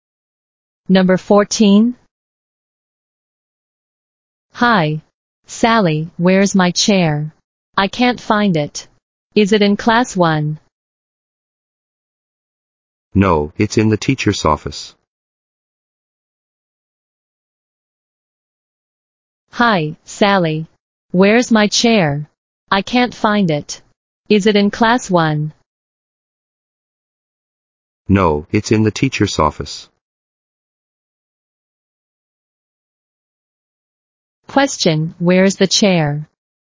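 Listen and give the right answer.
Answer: In the teacher's office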